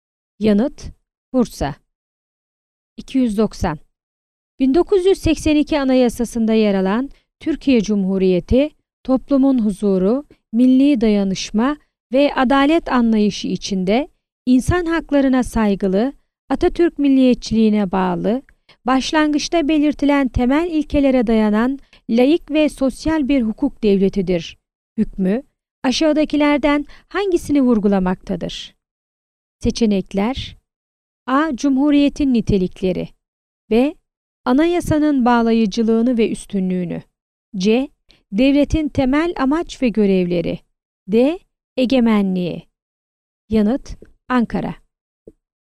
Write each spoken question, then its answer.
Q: 1982 Anayasası'nda yer alan Türkiye Cumhuriyeti, toplumun huzuru, milli dayanışma ve adalet anlayışı içinde insan haklarına saygılı, Atatürk milliyetçiliğine bağlı, başlangıçta belirtilen temel ilkelere dayanan laik ve sosyal bir hukuk devletidir hükmü aşağıdakilerden hangisini vurgulamaktadır?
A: Yanıt: Ankara.